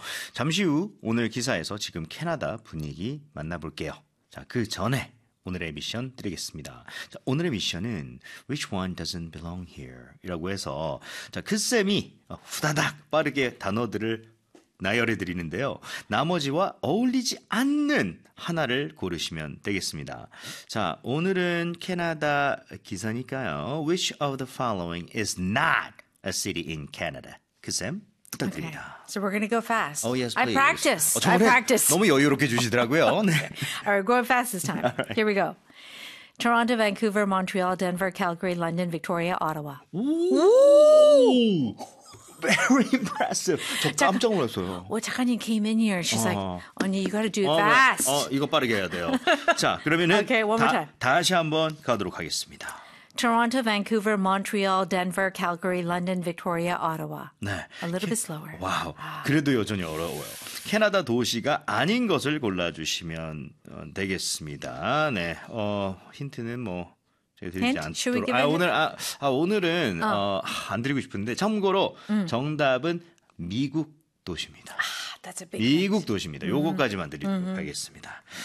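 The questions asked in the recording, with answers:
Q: Which of the following is not a city in Canada?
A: Denver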